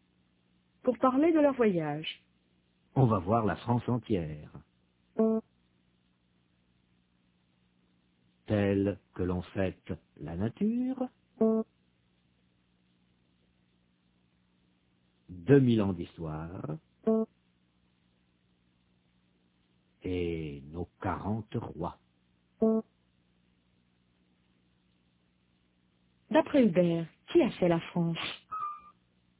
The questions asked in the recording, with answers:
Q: D'après Hubert, qui a fait la France?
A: La nature, 2000 ans d'histoire et 40 rois.